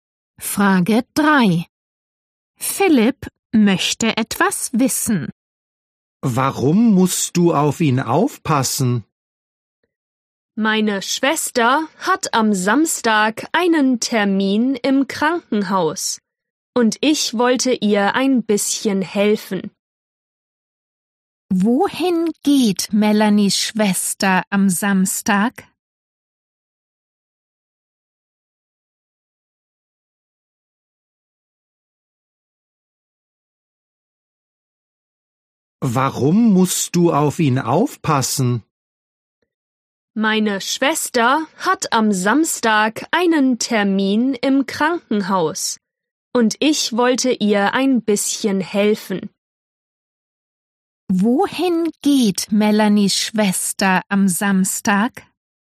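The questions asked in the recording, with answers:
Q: Wohin geht Melanies Schwester am Samstag?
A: Ins Krankenhaus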